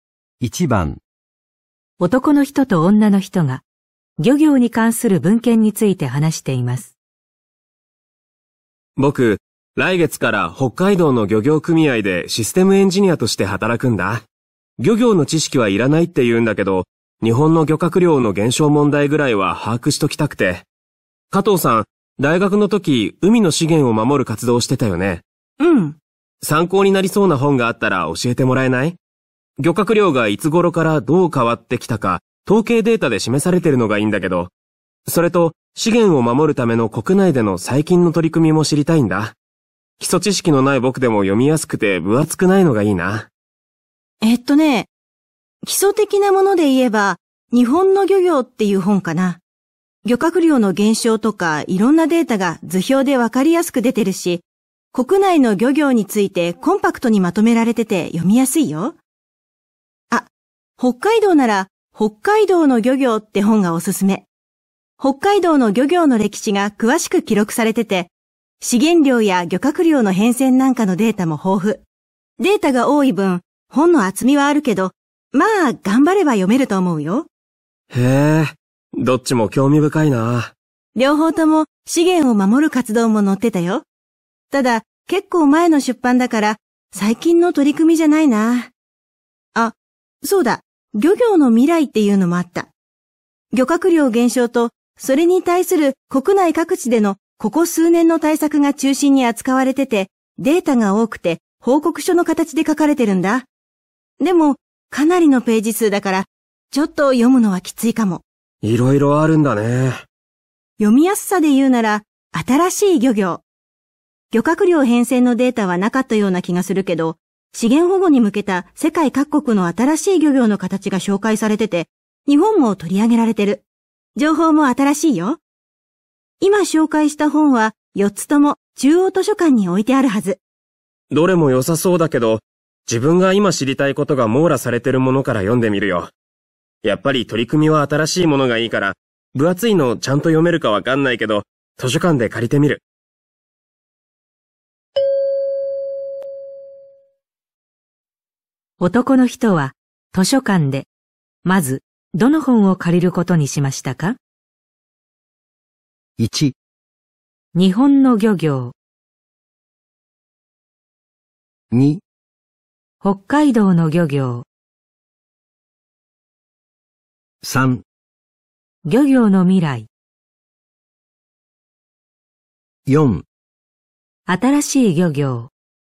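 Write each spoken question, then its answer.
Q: 男の人は図書館で、まずどの本を借りることにしましたか?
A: 3: 漁業の未来。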